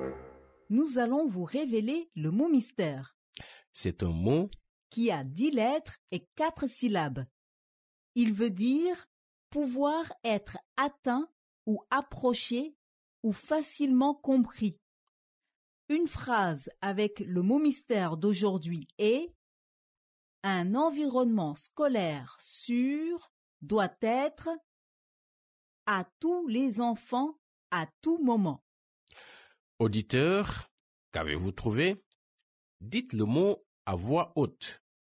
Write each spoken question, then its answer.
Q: Auditeur, qu'avez-vous trouvé?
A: Le mot mystère d'aujourd'hui est accessible.